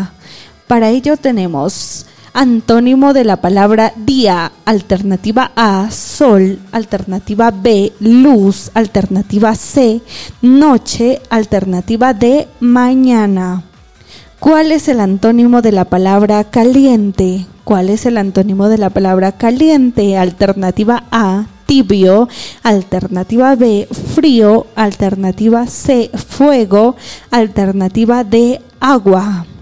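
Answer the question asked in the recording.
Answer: B: frío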